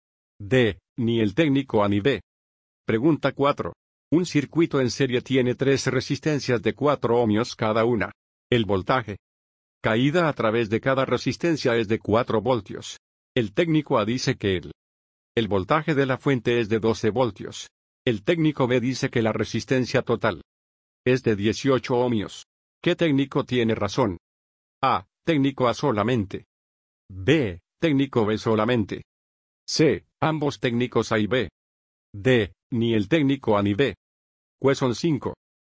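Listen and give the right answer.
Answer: A: Técnico A solamente.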